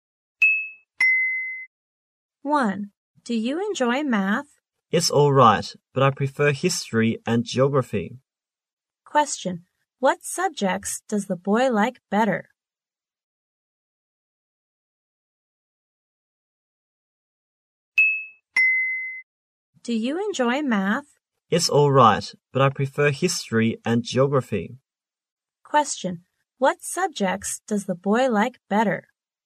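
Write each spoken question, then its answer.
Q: What subjects does the boy like better?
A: History and geography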